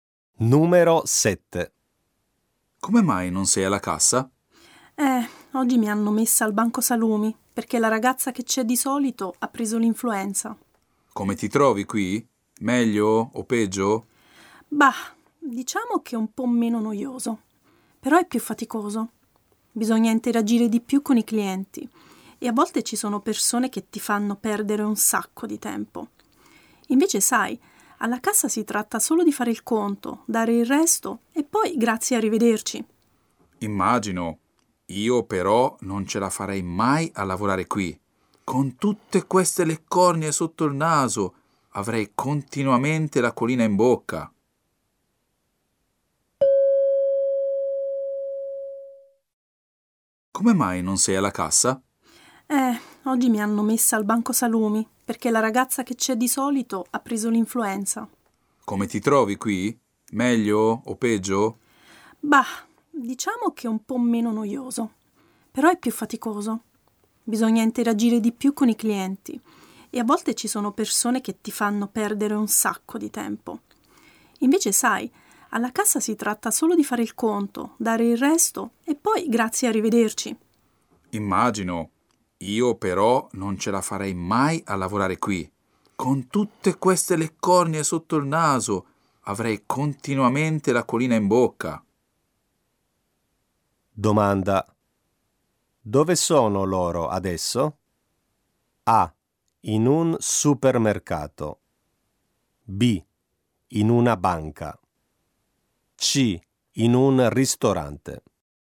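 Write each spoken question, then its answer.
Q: Dove sono loro adesso?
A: A: In un supermercato.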